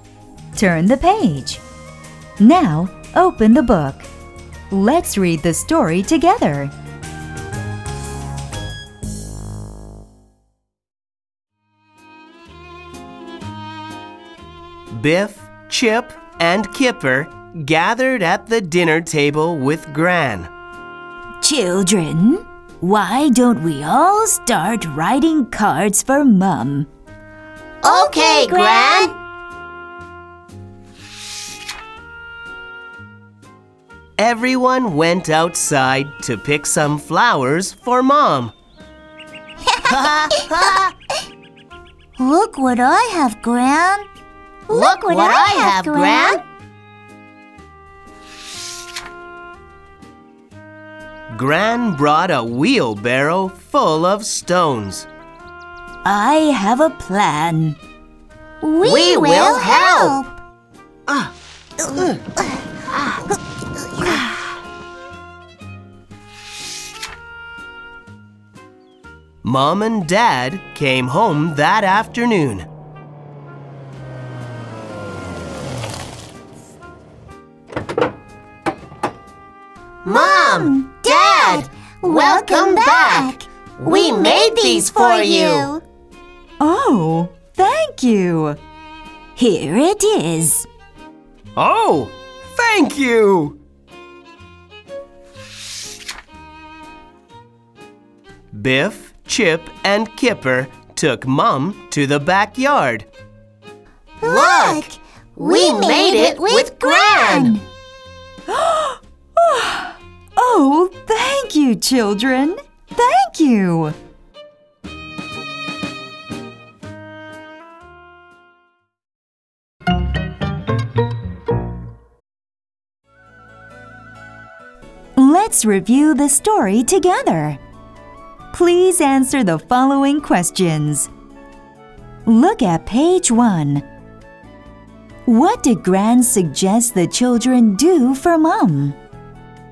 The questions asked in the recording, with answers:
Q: Look at page 1. What did Gran suggest the children do for Mum?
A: Gran suggested the children write a card for Mum.